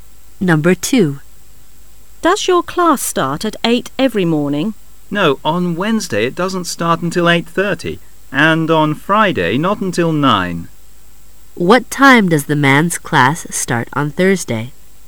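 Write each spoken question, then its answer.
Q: What time does the man's class start on Thursday?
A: At 8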